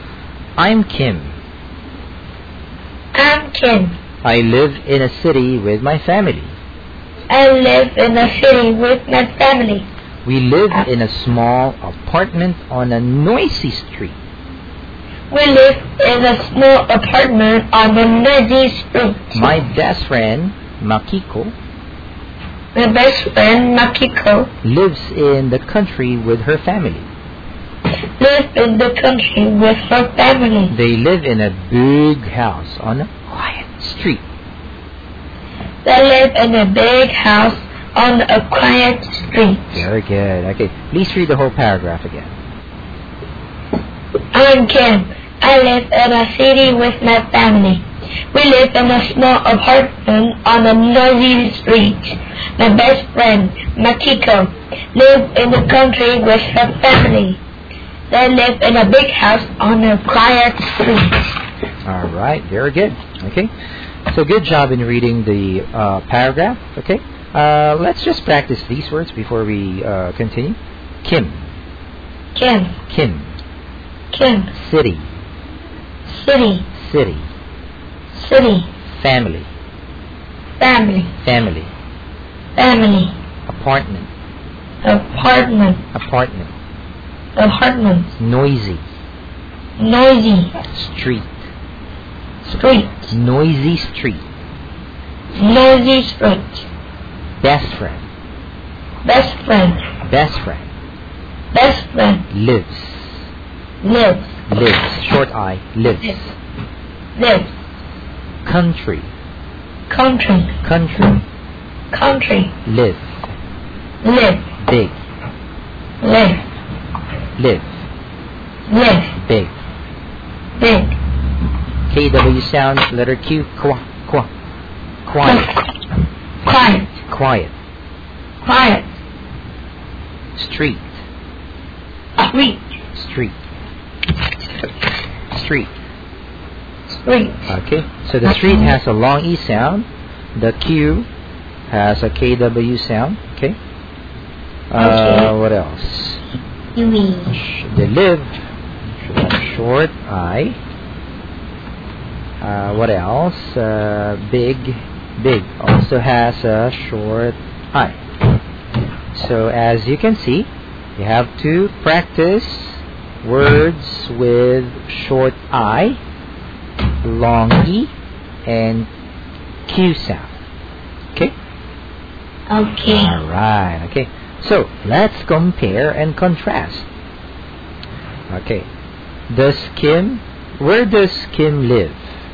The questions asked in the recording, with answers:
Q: Where does Kim live?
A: She lives in the city.